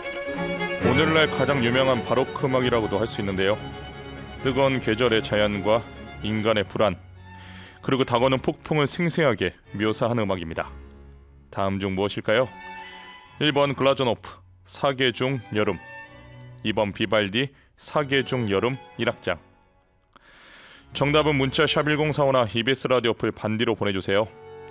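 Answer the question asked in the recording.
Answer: 2: 비발디, 사계 중 여름 1악장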